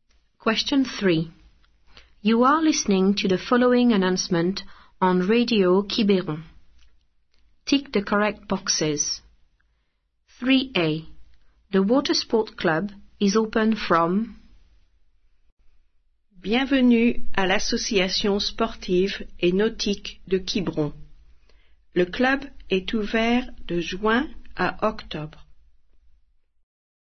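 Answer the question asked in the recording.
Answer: June to October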